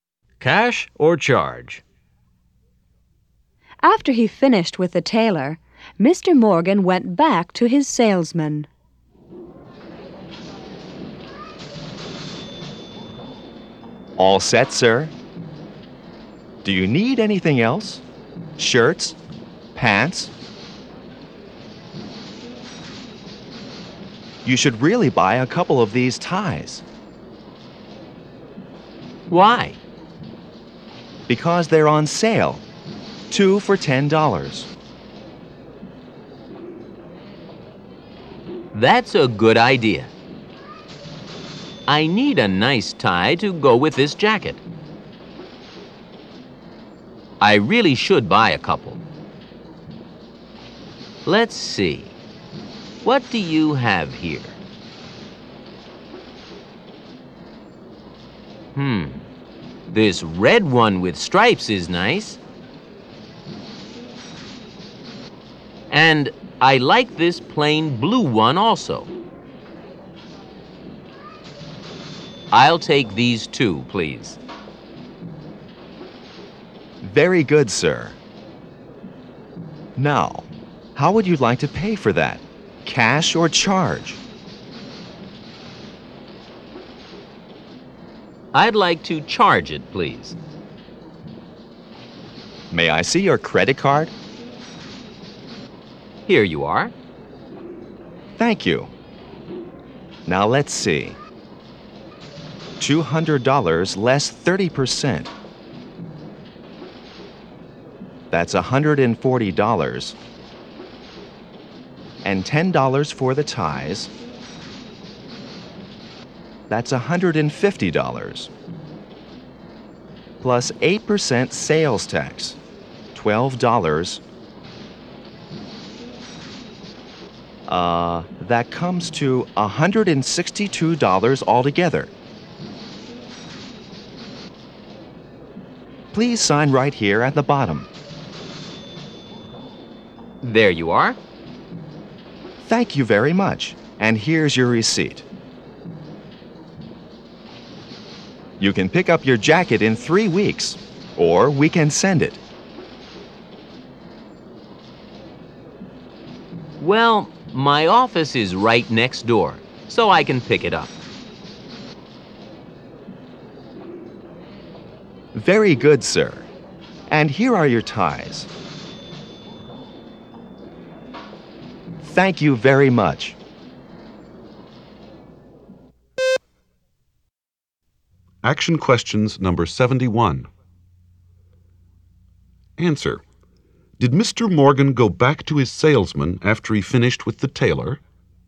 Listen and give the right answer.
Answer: Yes, he did.